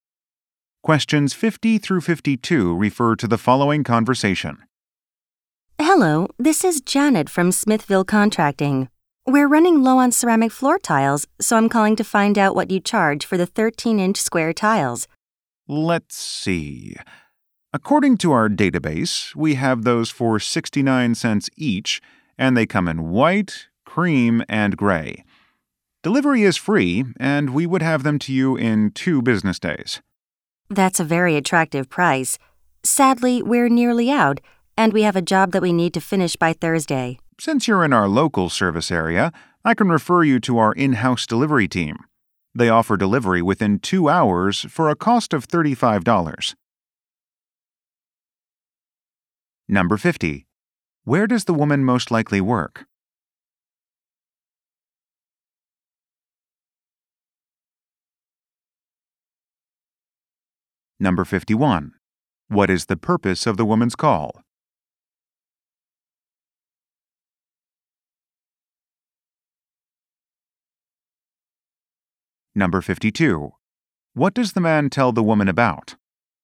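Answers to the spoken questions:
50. At a contracting company
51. To ask the price of floor tiles
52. A fast in-house delivery service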